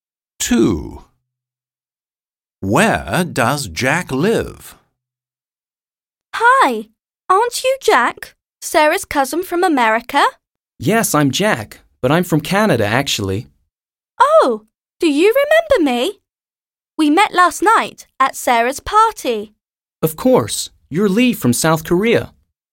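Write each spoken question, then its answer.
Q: Where does Jack live?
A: Canada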